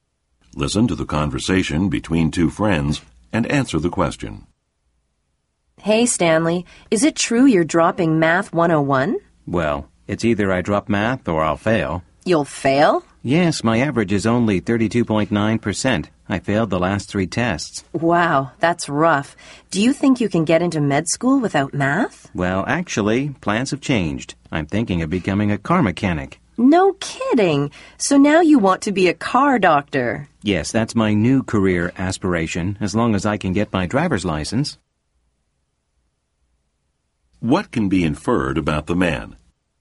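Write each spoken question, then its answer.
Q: What can be inferred about the man?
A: He no longer plans to go to medical school; he now wants to become a car mechanic.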